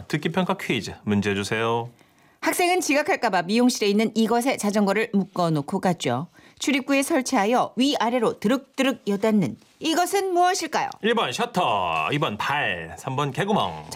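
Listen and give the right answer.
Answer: 1번: 셔터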